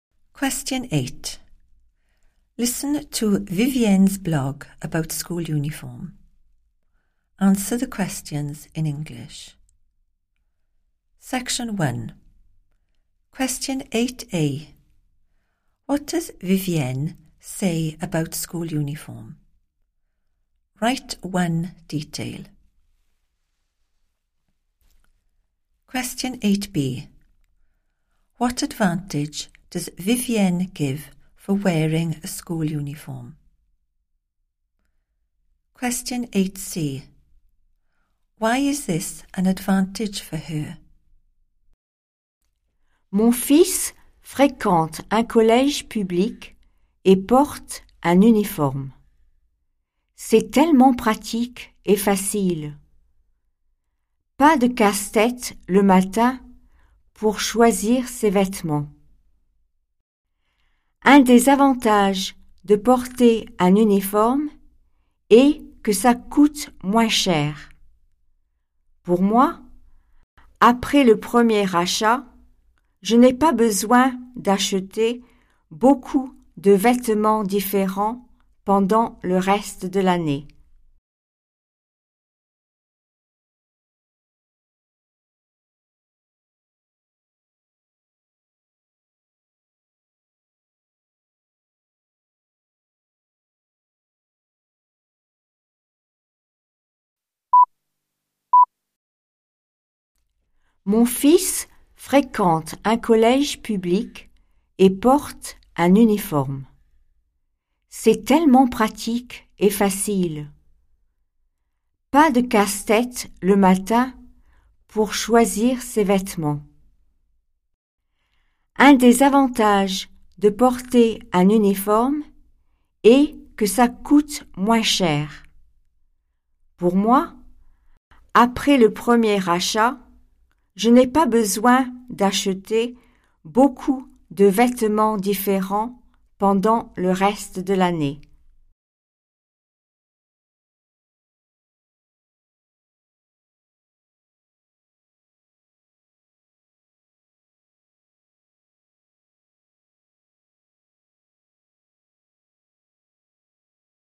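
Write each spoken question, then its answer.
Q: What does Vivienne say about school uniform?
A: it is practical and easy

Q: What advantage does Vivienne give for wearing a school uniform?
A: it costs less

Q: Why is this an advantage for her?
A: after the first purchase she doesn't need to buy many different clothes for the rest of the year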